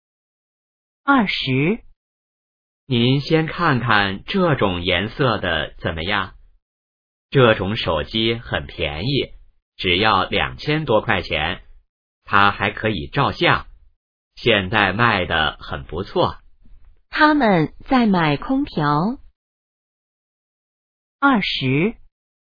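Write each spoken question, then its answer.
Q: 他们在买空调。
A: 错(他们在买手机)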